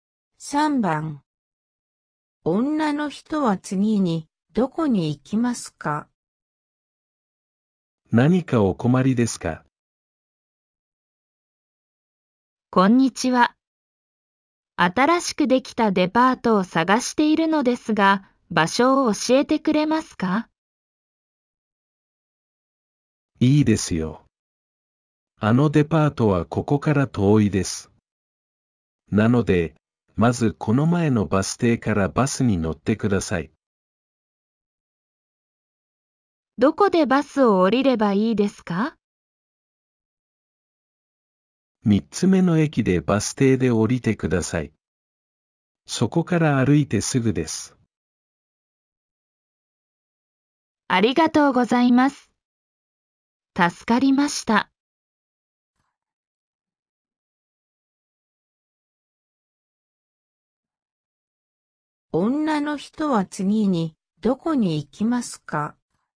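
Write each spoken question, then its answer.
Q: 女の人は次にどこに行きますか?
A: この前のバス停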